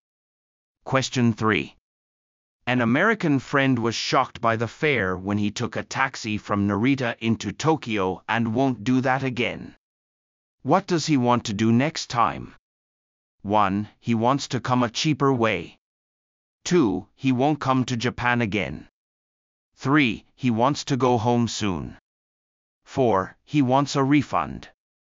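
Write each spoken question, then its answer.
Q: What does he want to do next time?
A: 1: He wants to come a cheaper way.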